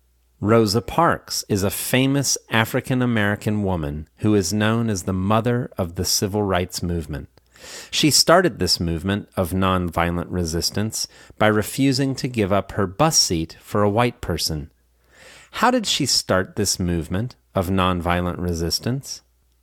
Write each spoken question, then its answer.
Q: How did she start this movement of nonviolent resistance?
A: She started this movement of nonviolent resistance by refusing to give up her bus seat for a white person.